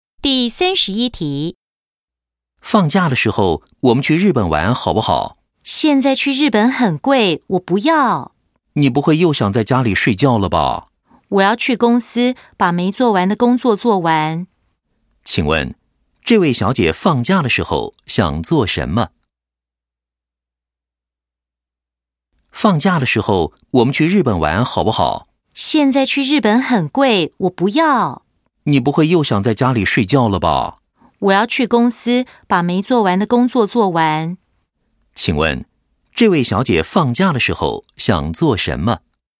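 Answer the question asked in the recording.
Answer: 去公司把没做完的工作做完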